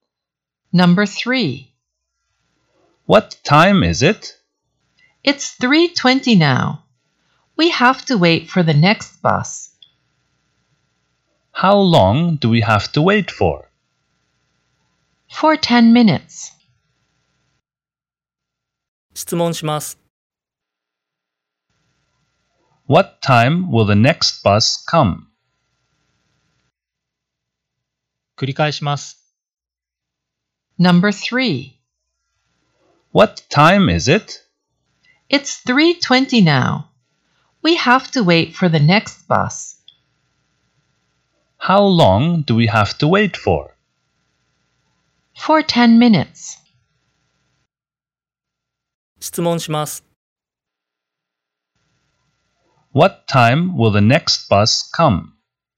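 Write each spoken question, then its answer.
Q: What time will the next bus come?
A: At 3:30.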